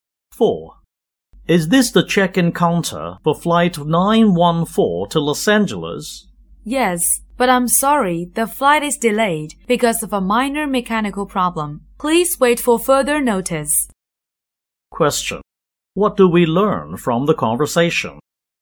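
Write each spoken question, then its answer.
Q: What do we learn from the conversation?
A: Flight 914 is delayed by a minor mechanical problem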